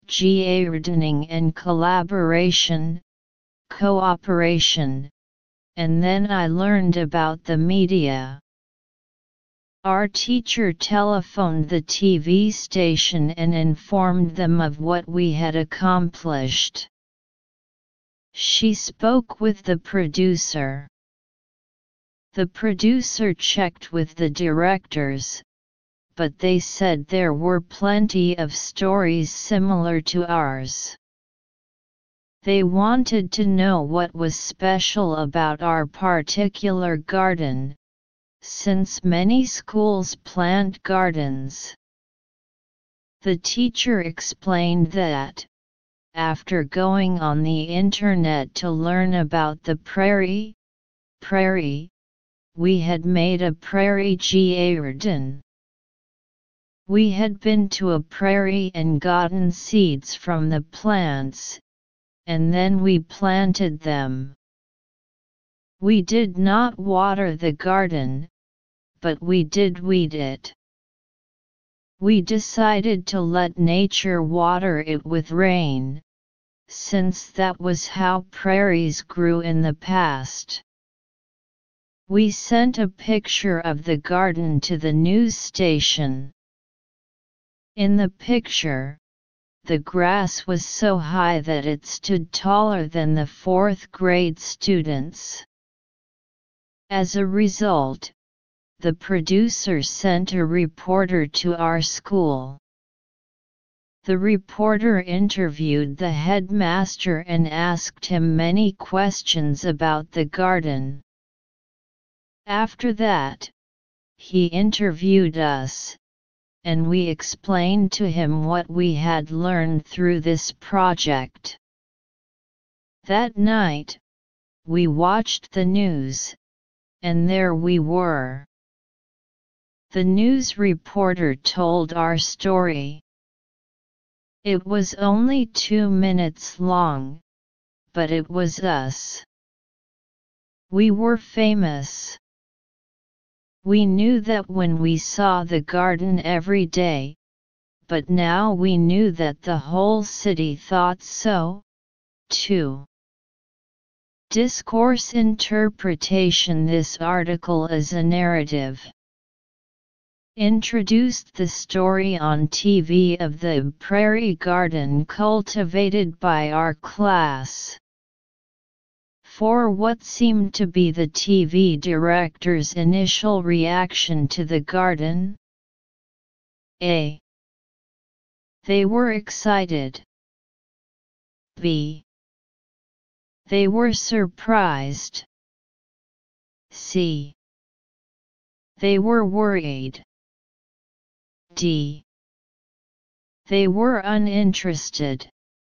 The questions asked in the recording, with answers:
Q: For what seemed to be the TV director's initial reaction to the garden?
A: Answer D.